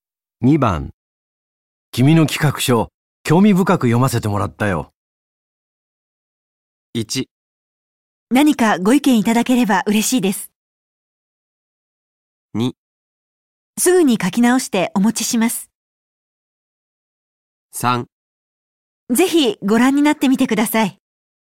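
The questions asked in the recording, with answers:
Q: 君の企画書、興味深く読ませてもらったよ。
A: 1: 何かご意見いただければ嬉しいです。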